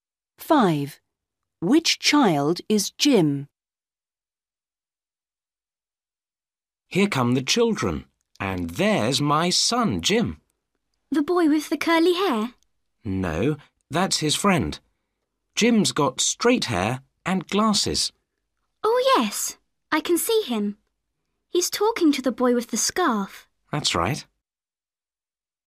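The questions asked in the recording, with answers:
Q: Which child is Jim?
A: the boy with straight hair and glasses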